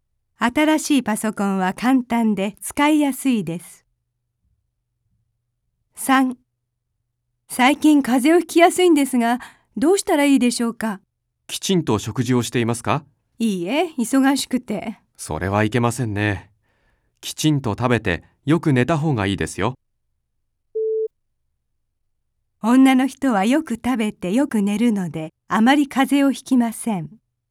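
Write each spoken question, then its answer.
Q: 女の人はよく食べてよく寝るので、あまり風邪をひきません。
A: ×(正しくない)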